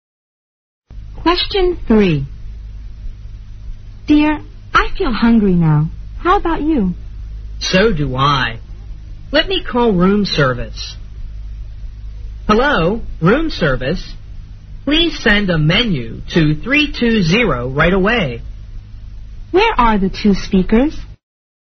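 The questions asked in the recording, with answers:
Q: Where are the two speakers?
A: In a hotel room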